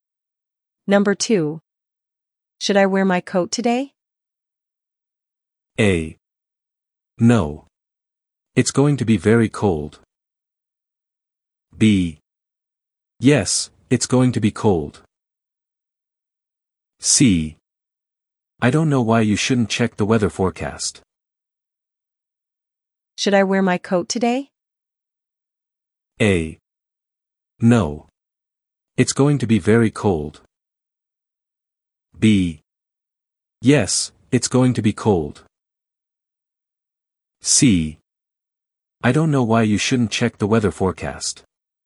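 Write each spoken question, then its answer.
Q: Should I wear my coat today?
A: B: Yes, it's going to be cold.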